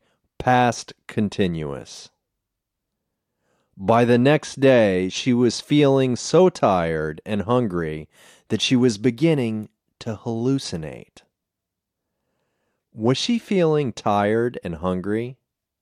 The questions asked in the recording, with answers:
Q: Was she feeling tired and hungry?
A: Yes, she was feeling tired and hungry.